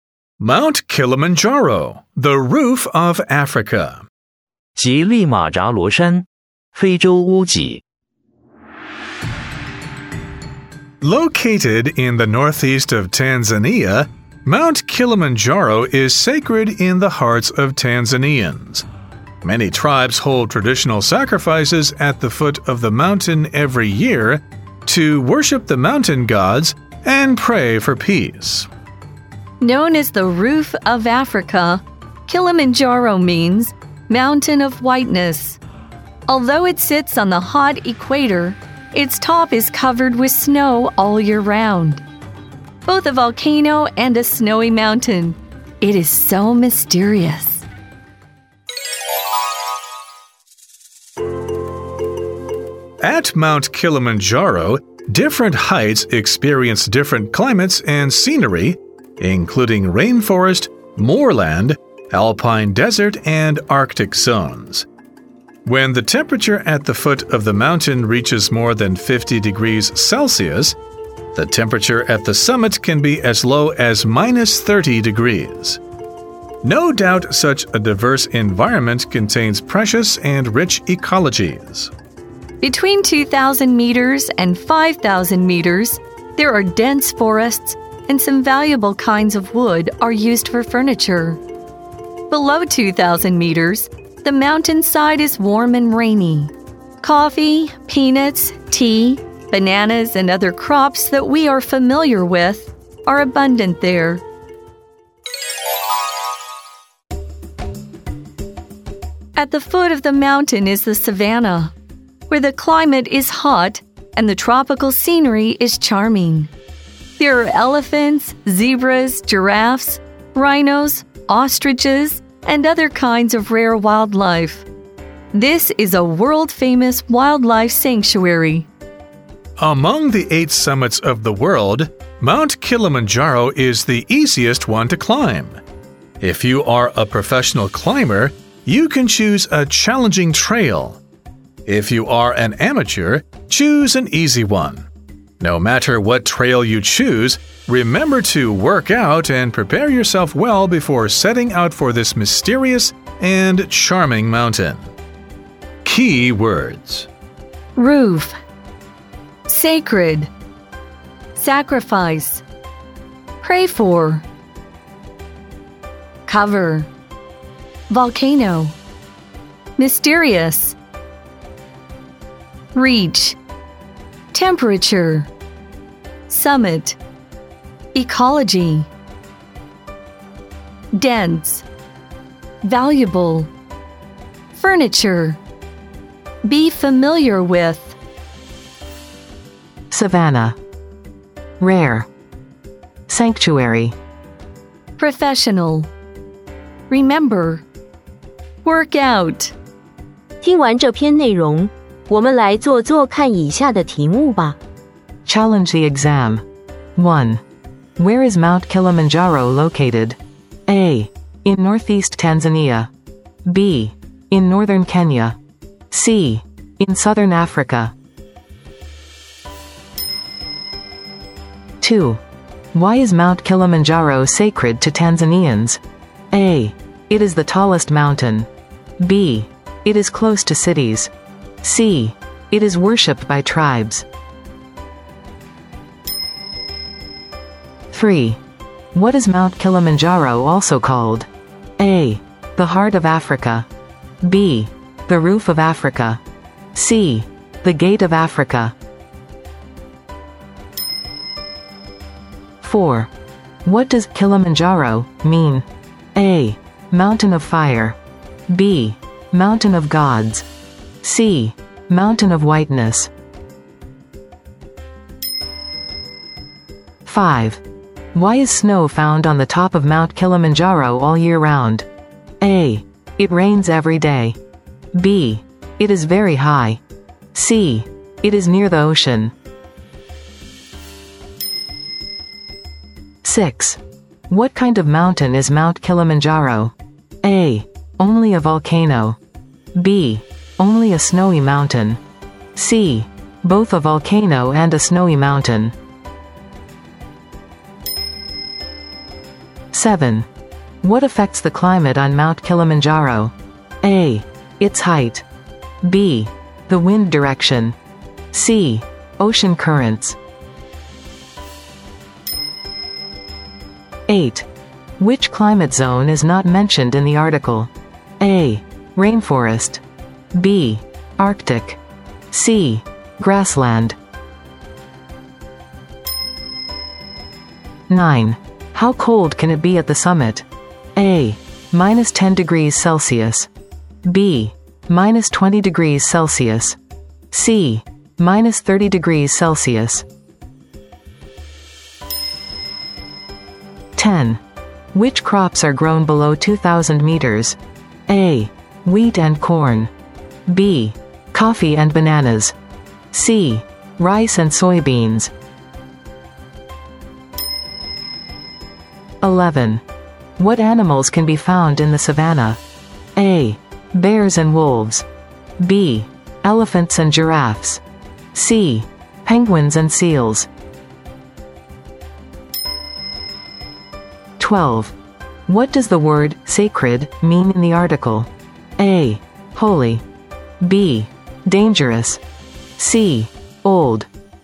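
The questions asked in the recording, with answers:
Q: Where is Mount Kilimanjaro located?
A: A: In northeast Tanzania.

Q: Why is Mount Kilimanjaro sacred to Tanzanians?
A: C: It is worshipped by tribes.

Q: What is Mount Kilimanjaro also called?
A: B: The Roof of Africa.

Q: What does Kilimanjaro mean?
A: C: Mountain of Whiteness.

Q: Why is snow found on the top of Mount Kilimanjaro all year round?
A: B: It is very high.

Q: What kind of mountain is Mount Kilimanjaro?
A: C: Both a volcano and a snowy mountain.

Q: What affects the climate on Mount Kilimanjaro?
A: A: Its height.

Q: Which climate zone is not mentioned in the article?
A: C: Grassland.

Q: How cold can it be at the summit?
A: C: Minus 30 degrees Celsius.

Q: Which crops are grown below 2,000 meters?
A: B: Coffee and bananas.

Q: What animals can be found in the savanna?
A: B: Elephants and giraffes.

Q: What does the word sacred mean in the article?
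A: A: Holy.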